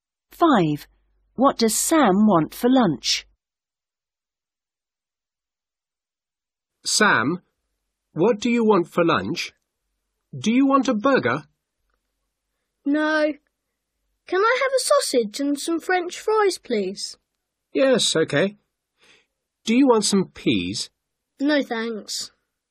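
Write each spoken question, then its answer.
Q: What does Sam want for lunch?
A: a sausage and French fries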